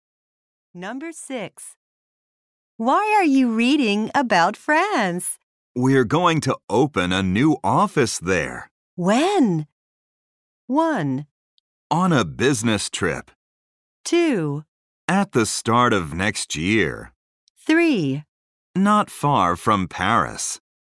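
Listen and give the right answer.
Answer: 2: At the start of next year.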